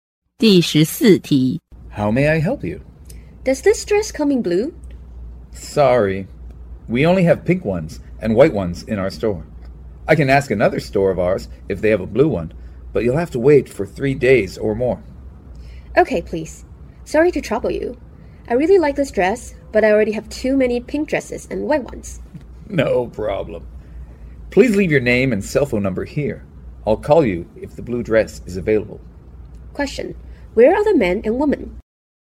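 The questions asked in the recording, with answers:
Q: Where are the men and women?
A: In a clothing store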